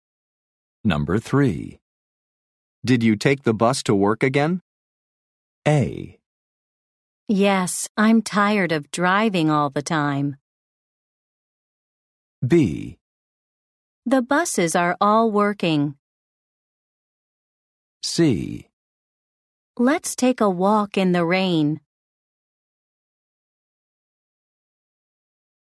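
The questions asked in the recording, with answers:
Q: Did you take the bus to work again?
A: A: Yes, I'm tired of driving all the time.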